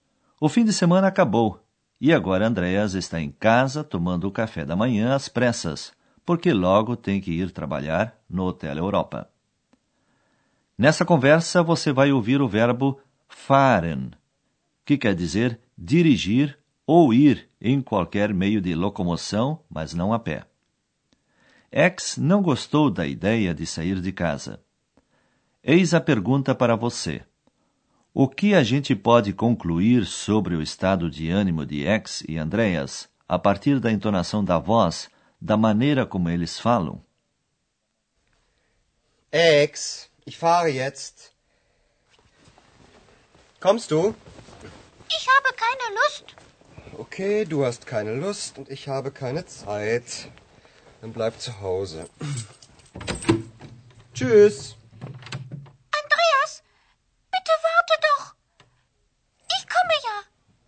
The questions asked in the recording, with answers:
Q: O que a gente pode concluir sobre o estado de ânimo de X e Andreas a partir da entonação da voz, da maneira como eles falam?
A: Você percebeu que a ex está desanimada e o Andreas bastante nervoso?